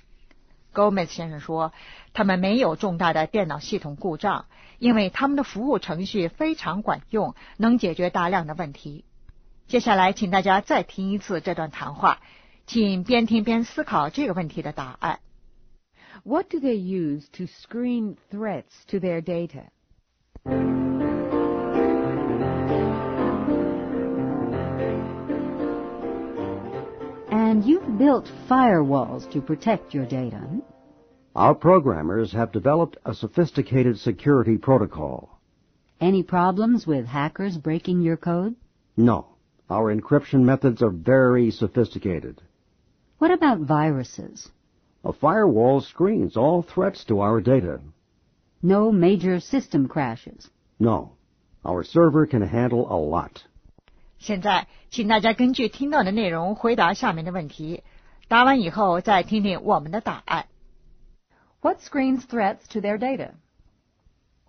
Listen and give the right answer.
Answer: A firewall.